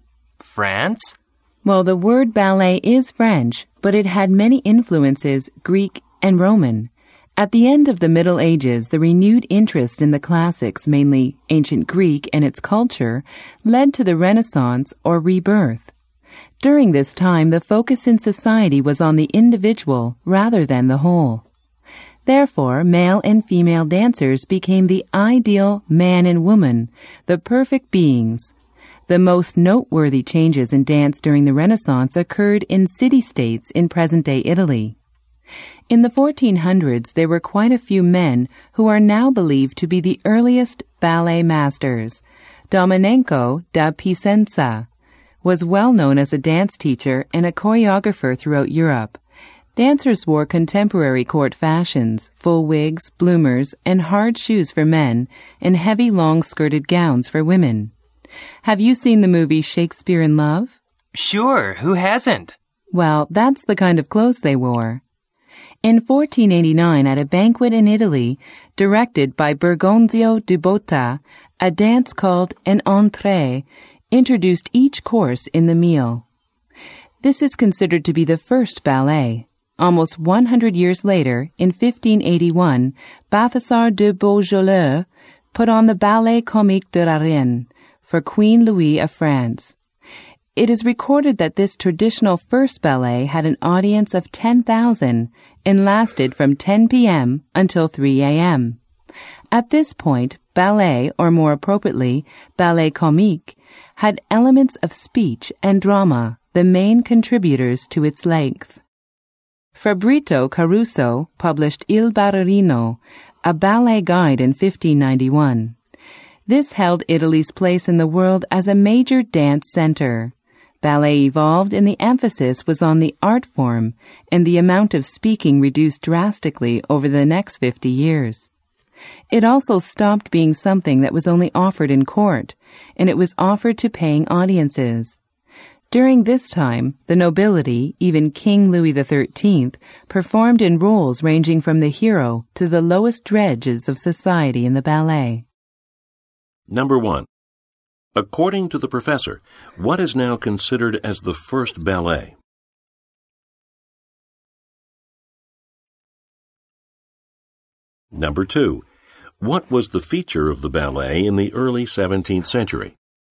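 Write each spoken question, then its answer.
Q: According to the professor, what is now considered as the first ballet?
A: The dances (entrées) introducing each course at a 1489 banquet in Italy directed by Bergonzio di Botta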